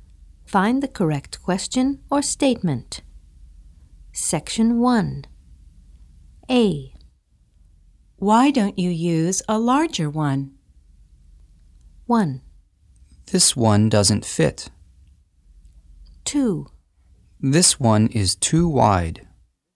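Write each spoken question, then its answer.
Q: Why don't you use a larger one?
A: 1: This one doesn't fit.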